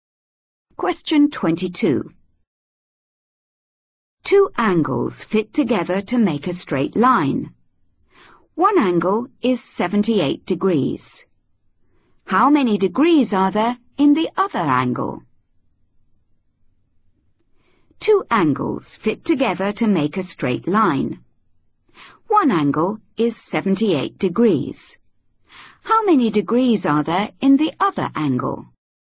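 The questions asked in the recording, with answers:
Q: How many degrees are there in the other angle?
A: 102 degrees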